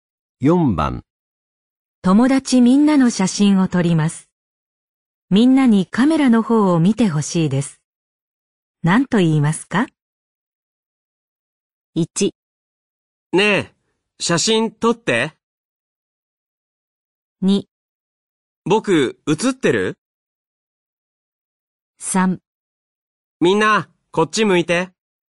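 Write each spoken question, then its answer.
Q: 何と言いますか?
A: 3: みんなこっち向いて。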